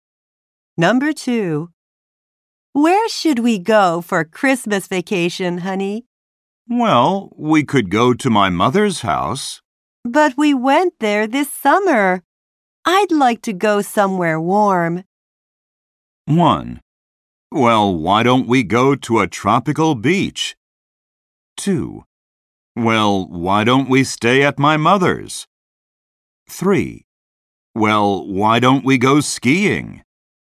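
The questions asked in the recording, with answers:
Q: I'd like to go somewhere warm.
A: 1: Well, why don't we go to a tropical beach?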